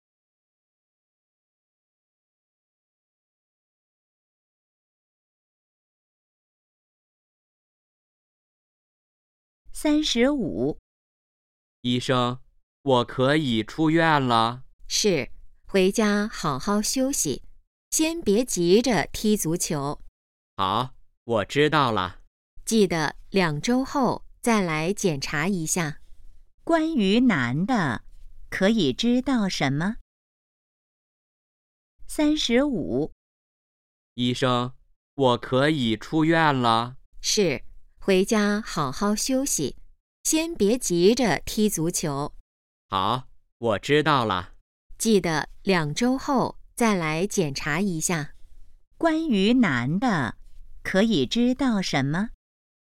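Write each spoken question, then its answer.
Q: 关于男的,可以知道什么?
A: 他可以出院了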